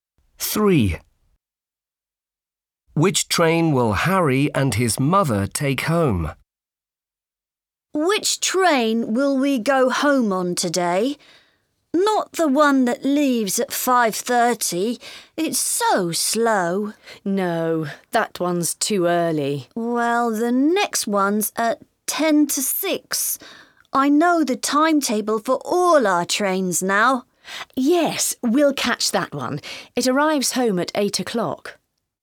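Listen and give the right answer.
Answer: the 5:50 train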